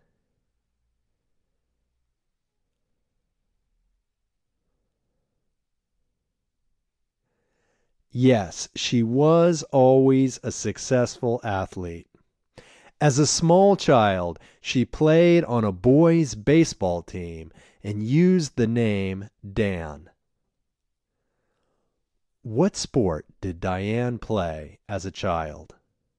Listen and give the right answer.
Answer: As a child, Diane played boys' baseball.